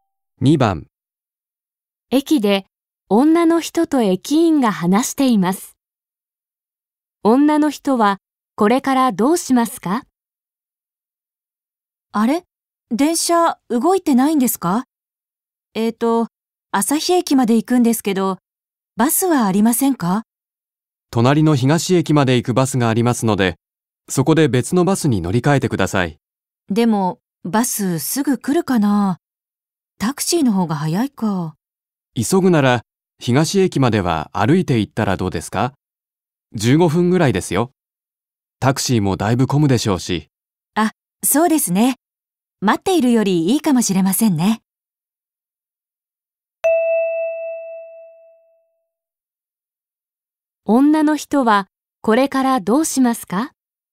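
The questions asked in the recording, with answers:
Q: 女の人はこれからどうしますか?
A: 東駅まで歩いて行く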